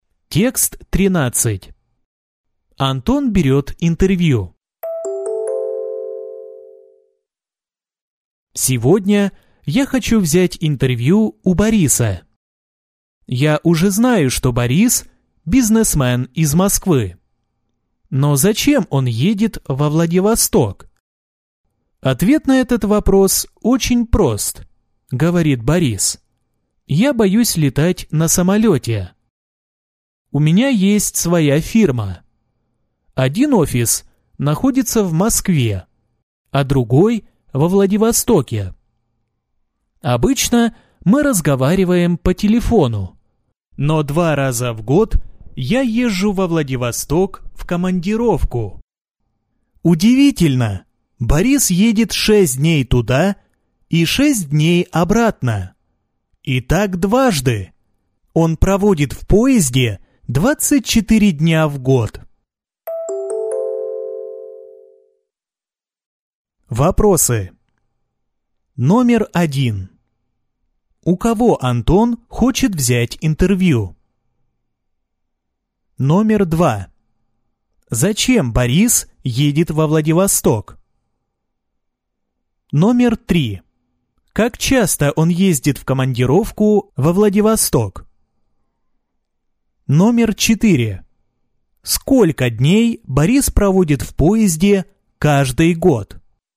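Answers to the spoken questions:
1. У Бориса
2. В командировку: там офис его фирмы
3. Два раза в год
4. 24 дня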